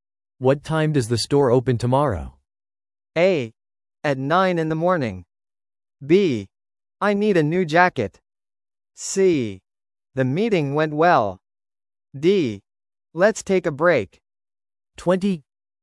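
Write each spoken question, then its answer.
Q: What time does the store open tomorrow?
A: A: At 9 in the morning.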